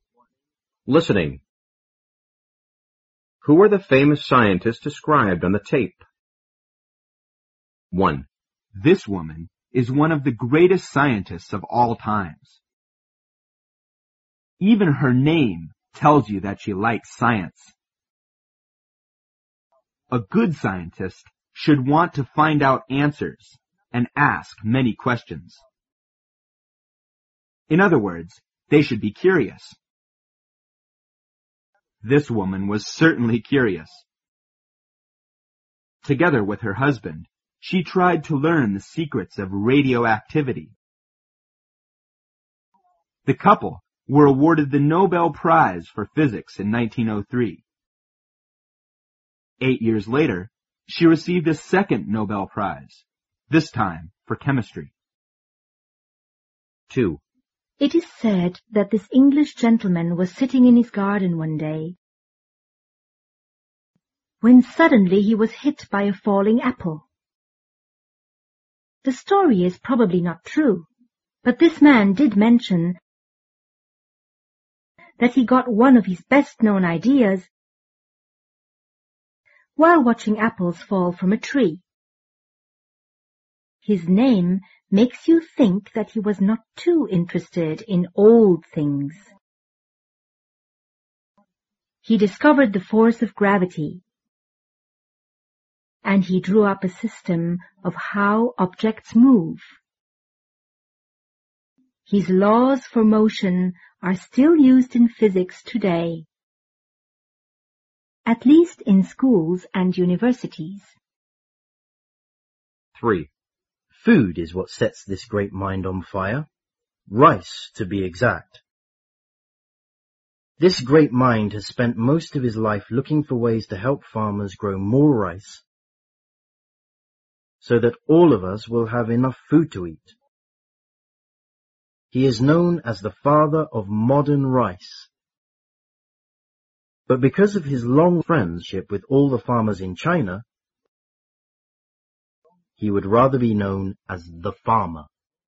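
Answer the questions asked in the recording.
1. Marie Curie
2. Isaac Newton
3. Yuan Longping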